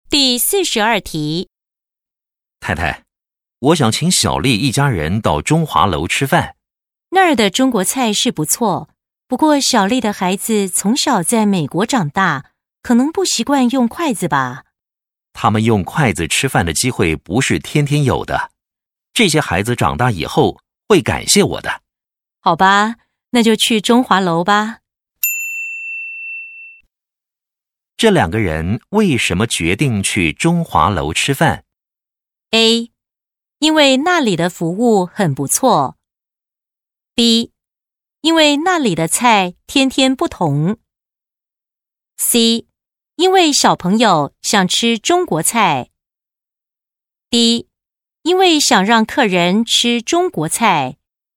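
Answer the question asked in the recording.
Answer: D: 因为想让客人吃中国菜。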